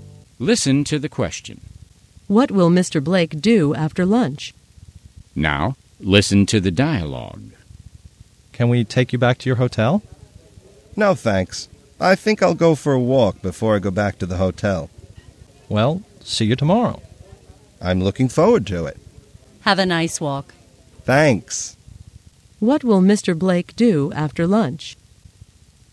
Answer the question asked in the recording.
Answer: He'll go for a walk.